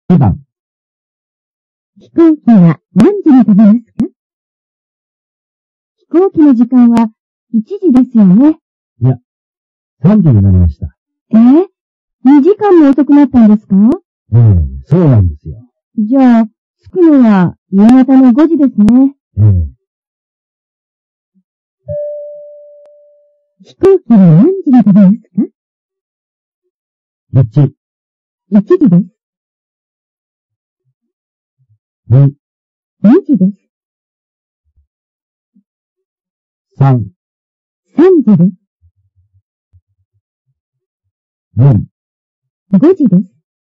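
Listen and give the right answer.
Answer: 3: 3時です。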